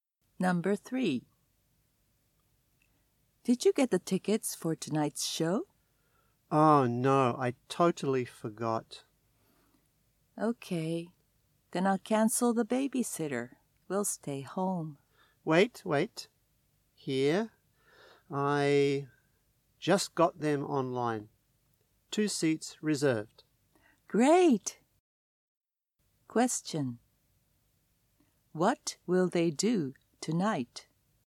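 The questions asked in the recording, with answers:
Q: What will they do tonight?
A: They will go to the show.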